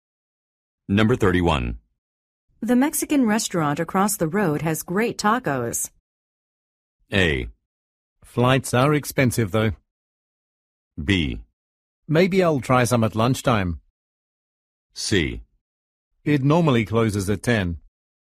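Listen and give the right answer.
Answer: B: Maybe I'll try some at lunchtime.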